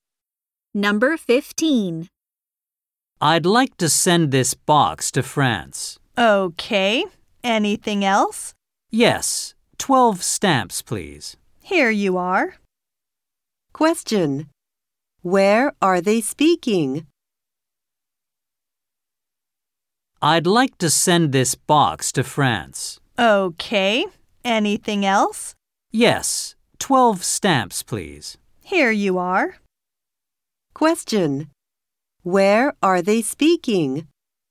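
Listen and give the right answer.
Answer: At a post office.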